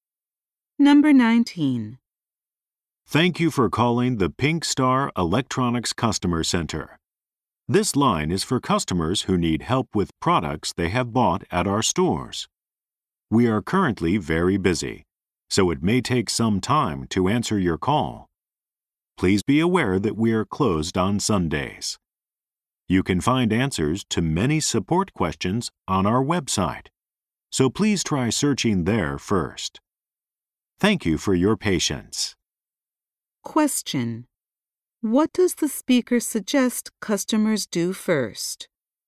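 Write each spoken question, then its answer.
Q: what does the speaker suggest customers do first?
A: Search for answers on the website.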